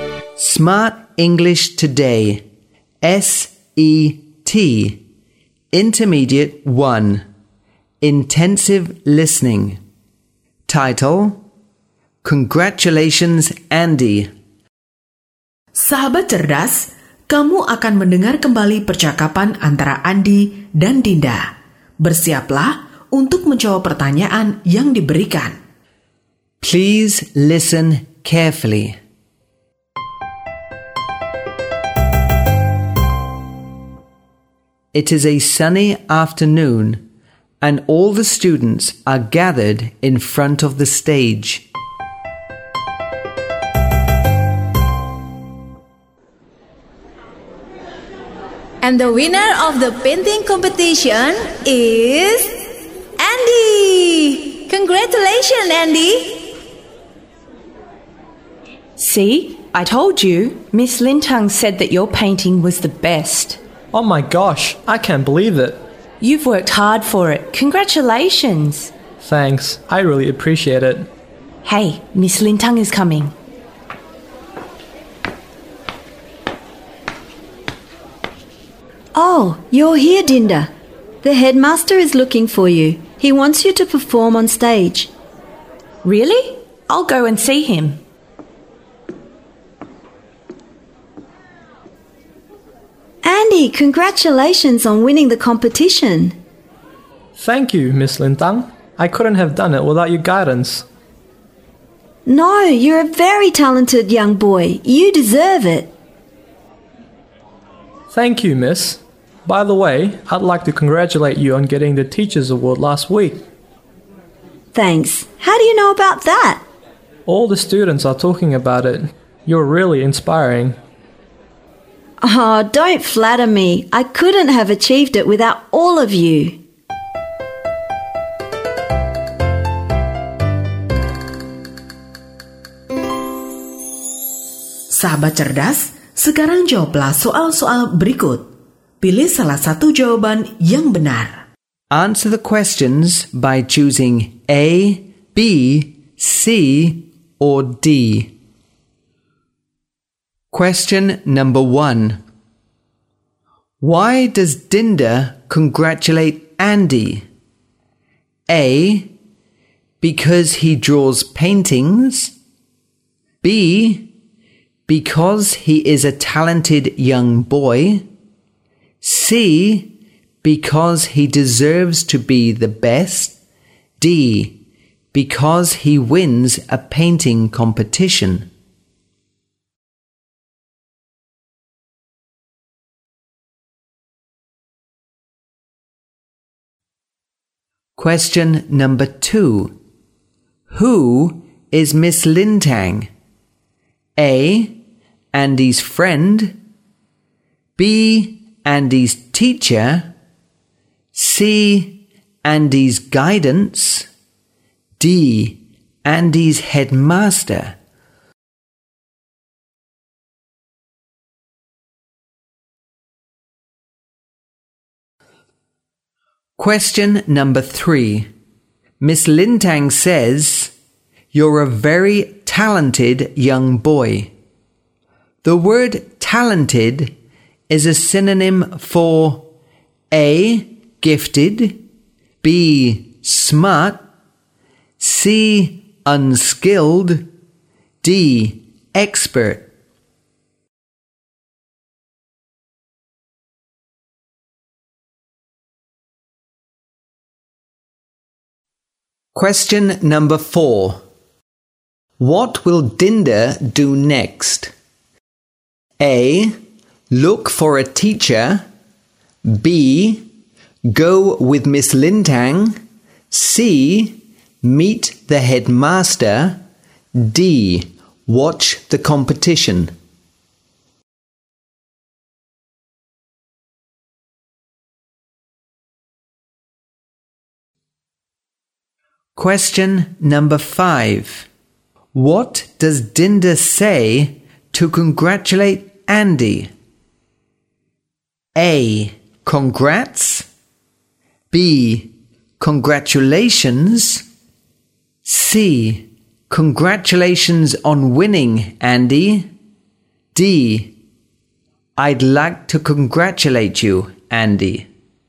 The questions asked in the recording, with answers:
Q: Why does Dinda congratulate Andy?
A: D. Because he wins a painting competition.

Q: Who is Miss Lintang?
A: B. Andy's teacher.

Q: Miss Lintang says, you're a very talented young boy. The word talented is a synonym for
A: A. Gifted.

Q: What will Dinda do next?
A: C, meet the headmaster.

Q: What does Dinda say to congratulate Andy?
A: B. Congratulations.